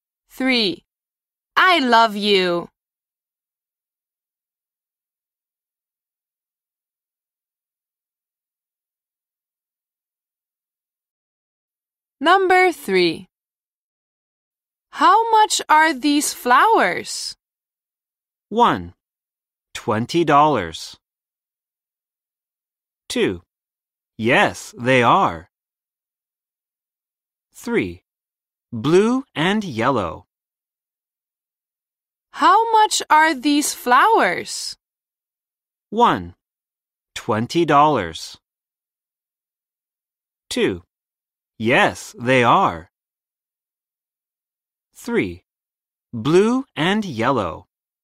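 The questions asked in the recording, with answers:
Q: How much are these flowers?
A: 1: $20.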